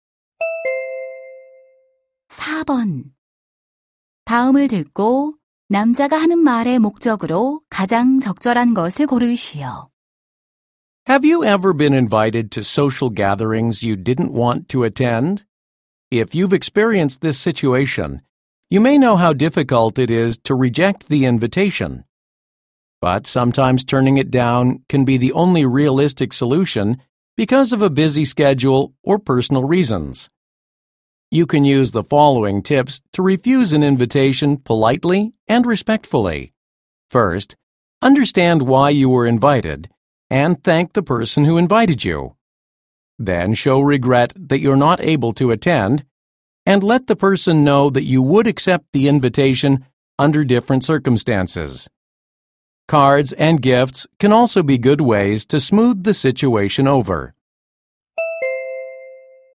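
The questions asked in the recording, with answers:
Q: 다음을 듣고 남자가 하는 말의 목적으로 가장 적절한 것을 고르시오.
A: 초대를 정중하게 거절하는 방법을 알려 주려고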